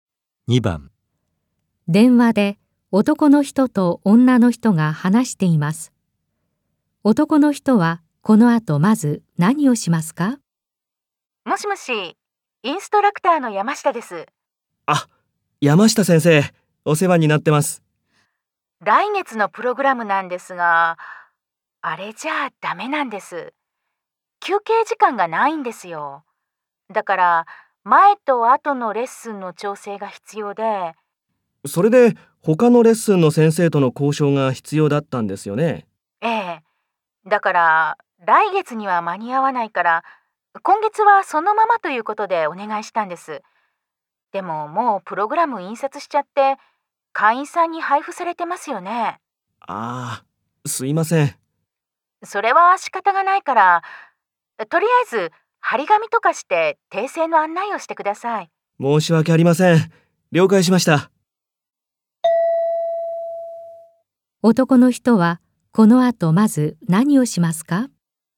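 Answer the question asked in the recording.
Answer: 張り紙をして訂正の案内をする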